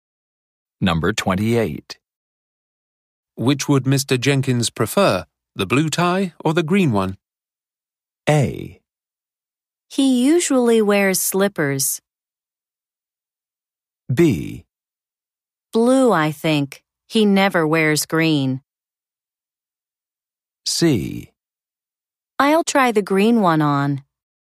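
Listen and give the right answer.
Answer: B: Blue, I think. He never wears green.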